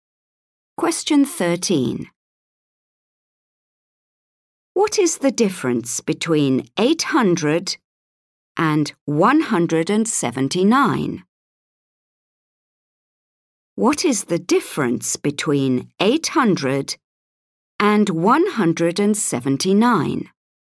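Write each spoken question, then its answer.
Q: What is the difference between 800 and 179?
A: 621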